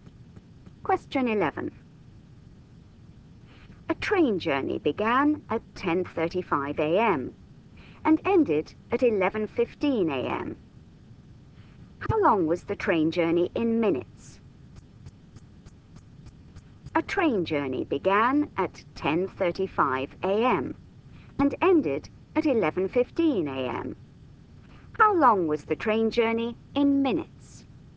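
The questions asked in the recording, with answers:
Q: How long was the train journey in minutes?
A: 40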